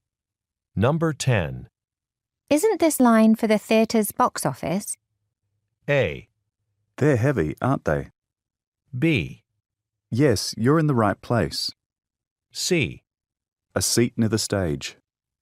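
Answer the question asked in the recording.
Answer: B: Yes, you're in the right place.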